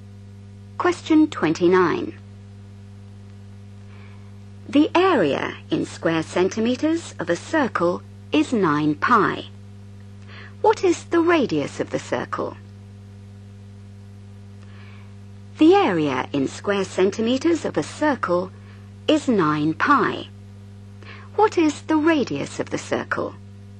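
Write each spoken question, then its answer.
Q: What is the radius of the circle?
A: 3 cm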